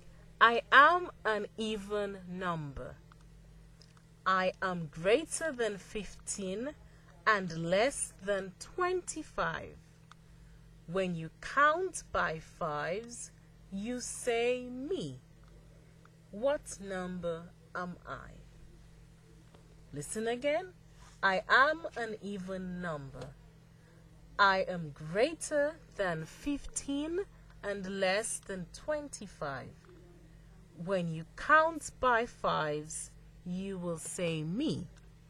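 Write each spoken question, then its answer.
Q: What number am I?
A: 20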